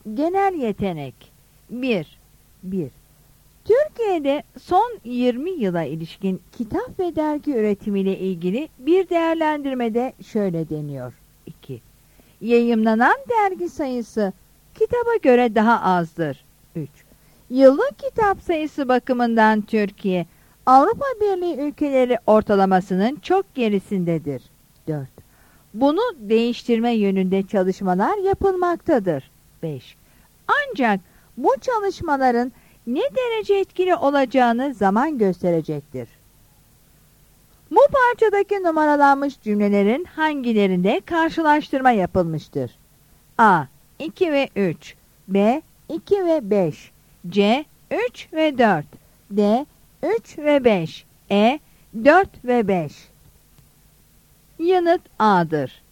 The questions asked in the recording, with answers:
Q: Bu parçadaki numaralanmış cümlelerin hangilerinde karşılaştırma yapılmıştır?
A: Yanıt A'dır.